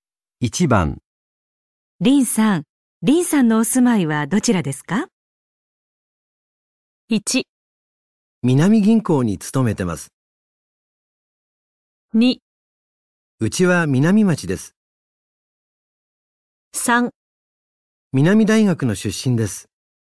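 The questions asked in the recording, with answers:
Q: 林さん、林さんのお住まいはどちらですか?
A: 2: うちは南町です。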